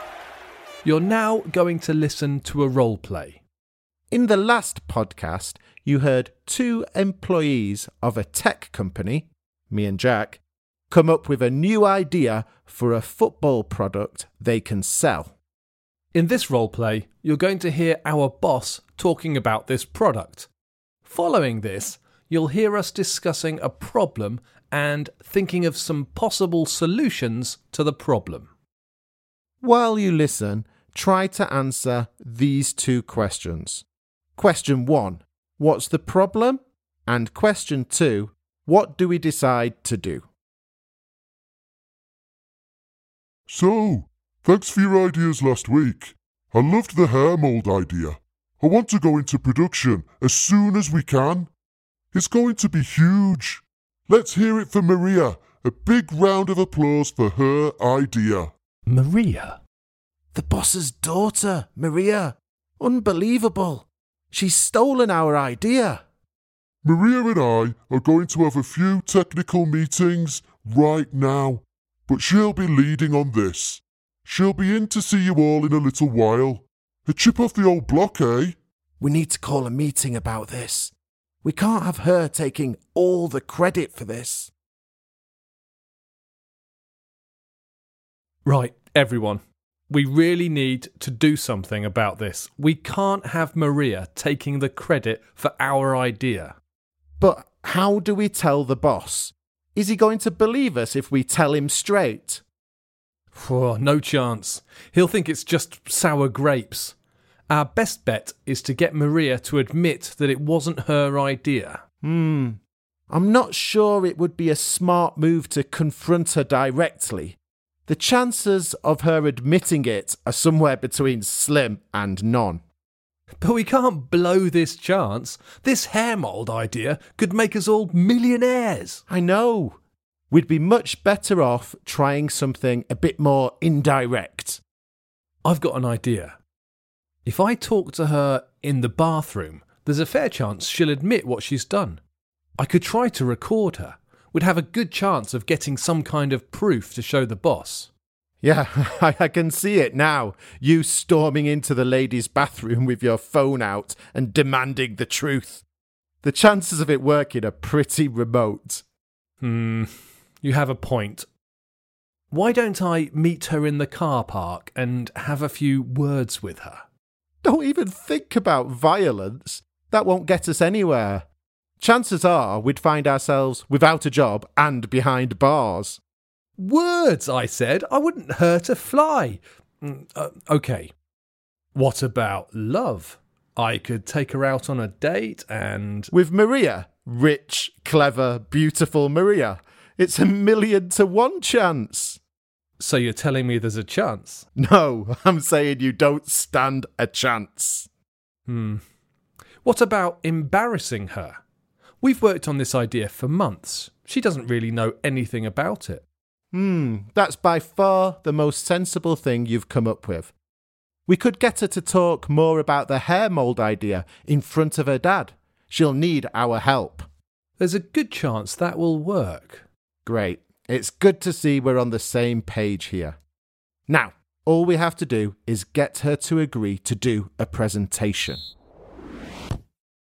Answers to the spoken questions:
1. The problem is that the boss's daughter, Maria, has stolen our product idea, and we're not very happy about this.
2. After discussing a few possible solutions that we thought wouldn't work, we decided that the best thing to do would be to make Maria talk about the product in detail in front of her dad.